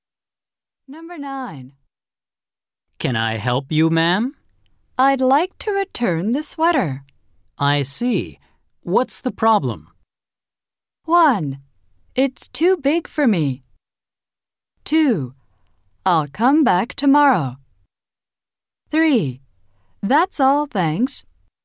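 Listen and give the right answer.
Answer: 1: It's too big for me.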